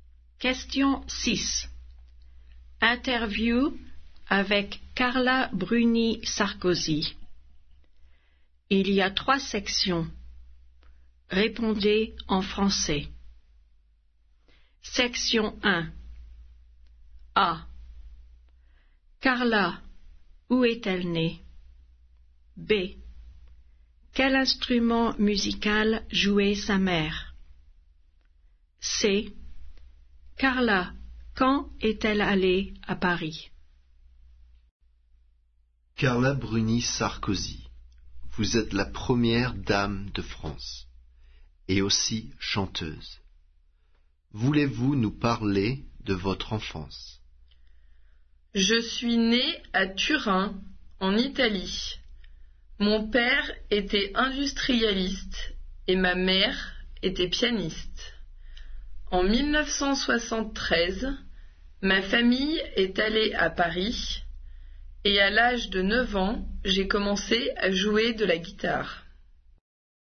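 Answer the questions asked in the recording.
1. À Turin, en Italie
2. Le piano
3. En 1973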